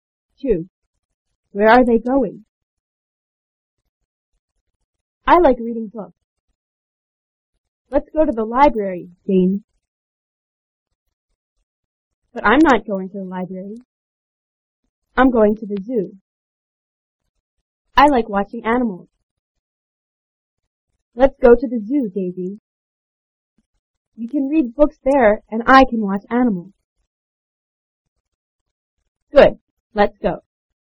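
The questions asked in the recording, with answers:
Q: Where are they going?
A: To the zoo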